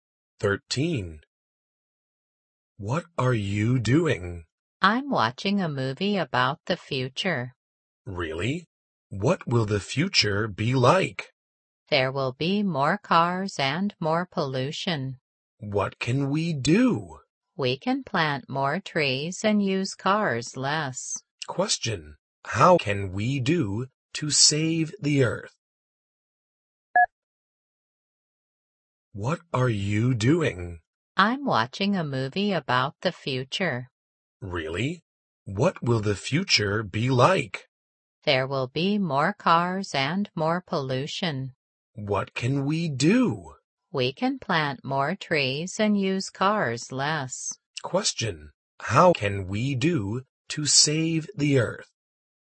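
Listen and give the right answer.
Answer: Plant more trees and use cars less.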